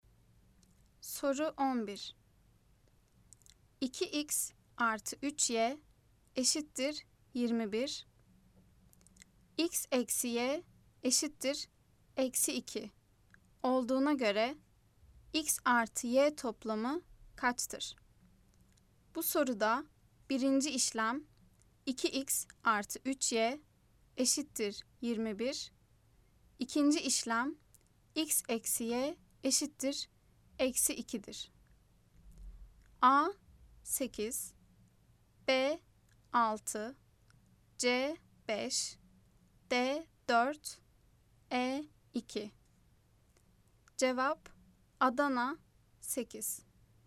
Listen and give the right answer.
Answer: Cevap Adana 8.